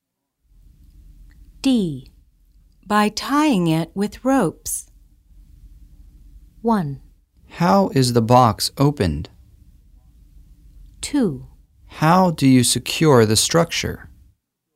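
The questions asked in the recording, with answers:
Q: By tying it with ropes.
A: 2: How do you secure the structure?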